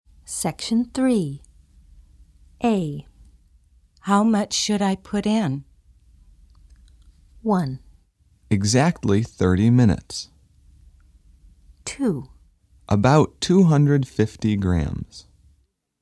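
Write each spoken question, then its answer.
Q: How much should I put in?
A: 2: About 250 grams.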